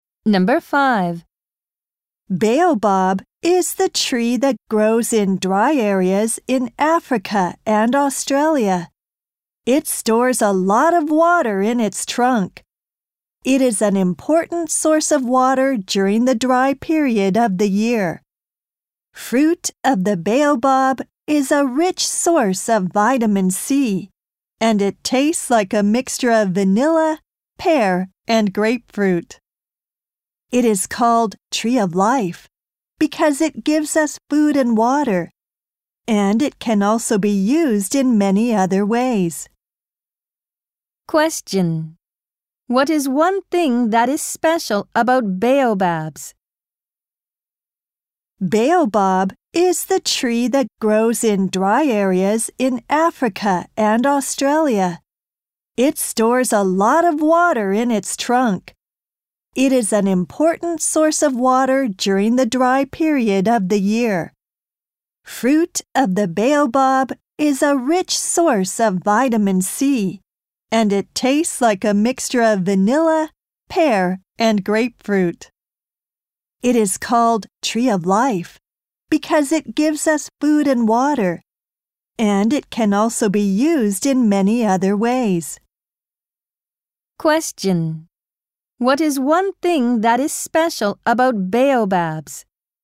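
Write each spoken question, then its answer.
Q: What is one thing that is special about baobabs?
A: It stores a lot of water in its trunk.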